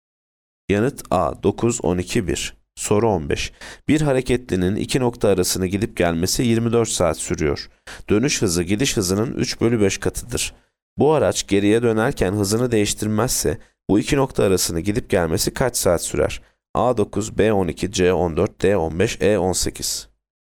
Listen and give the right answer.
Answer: Yanıt E 18.